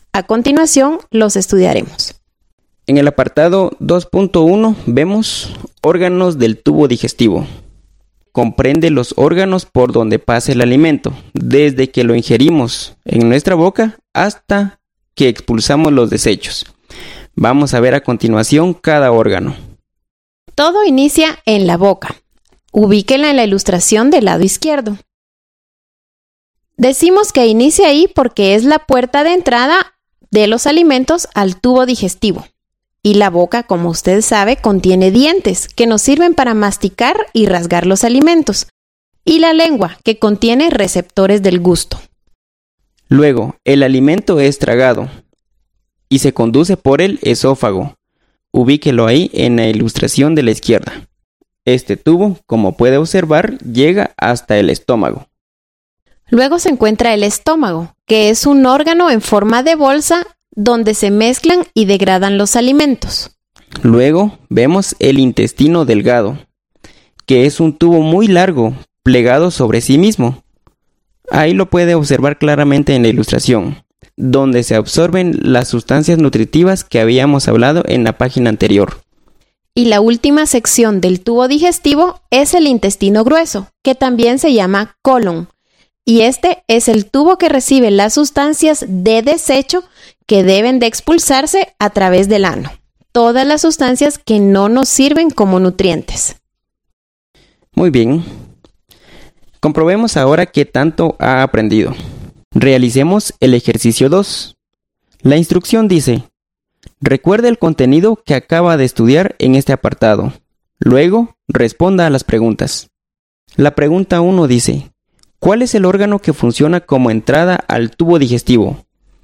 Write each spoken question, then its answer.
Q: ¿Cuál es el órgano que funciona como entrada al tubo digestivo?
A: Es la boca.